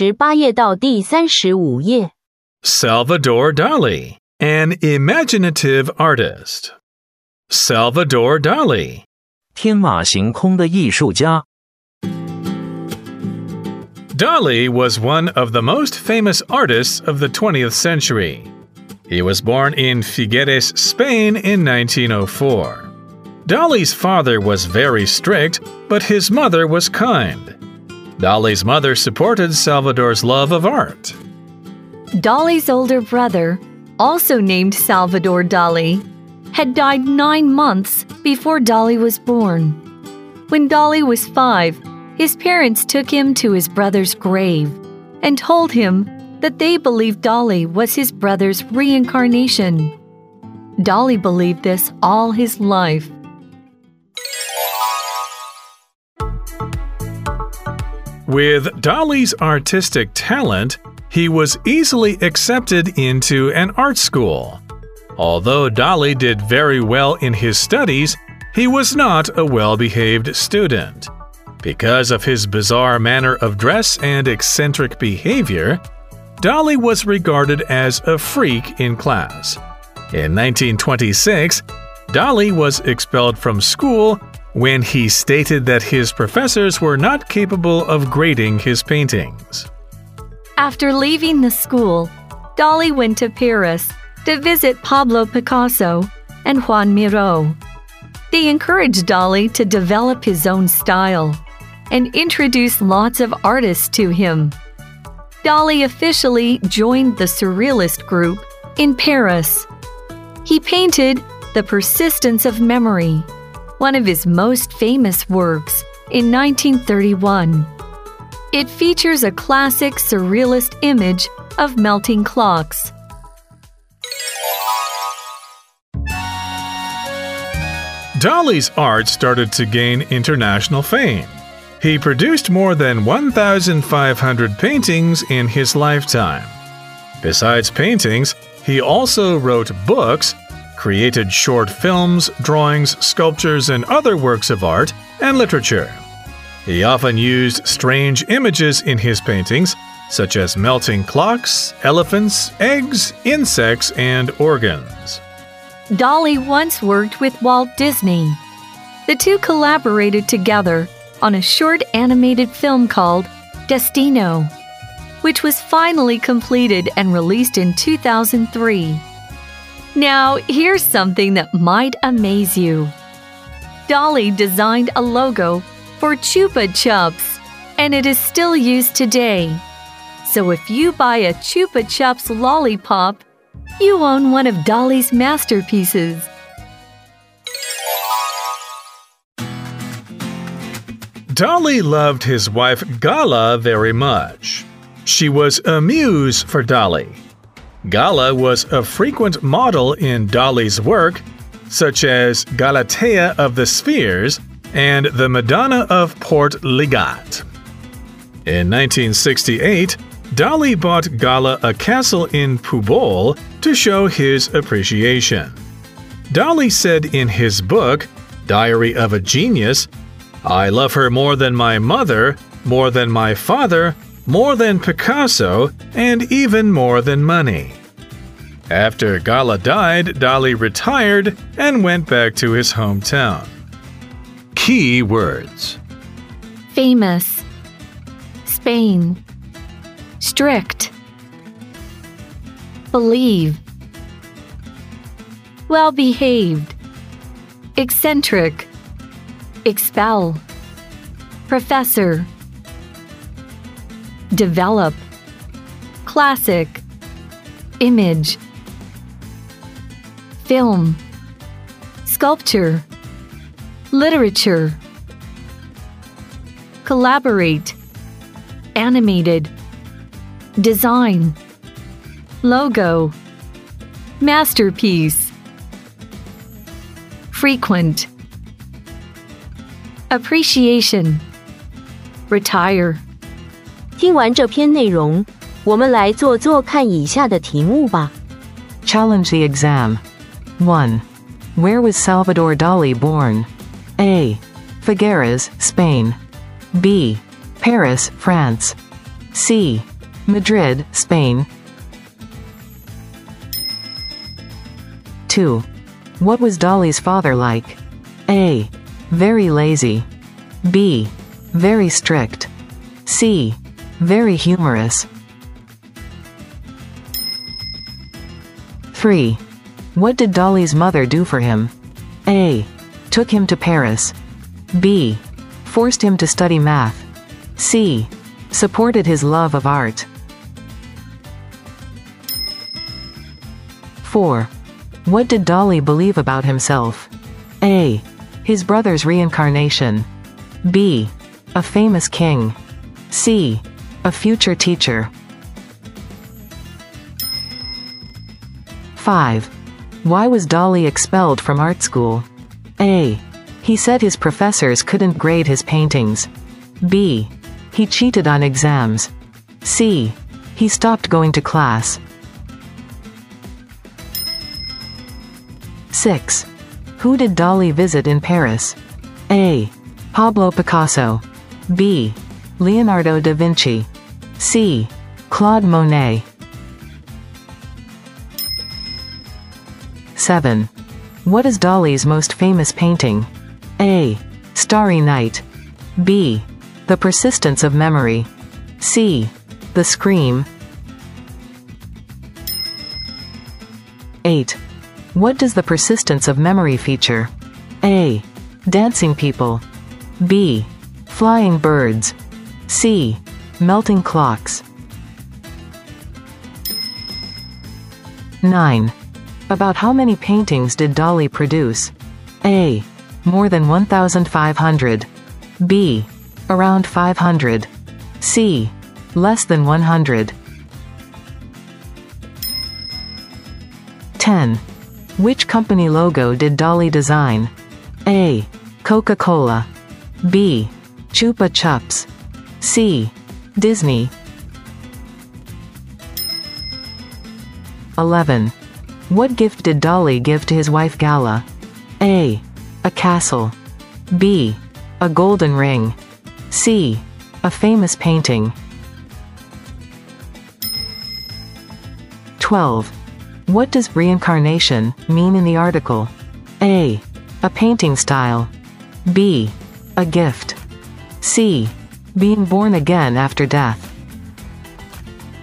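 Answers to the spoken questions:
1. A: Figueres, Spain.
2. B: Very strict.
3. C: Supported his love of art.
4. A: His brother's reincarnation.
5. A: He said his professors couldn't grade his paintings.
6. A: Pablo Picasso.
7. B: The Persistence of Memory.
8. C: Melting clocks.
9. A: More than 1,500.
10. B: Chupa Chups.
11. A: A castle.
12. C: Being born again after death.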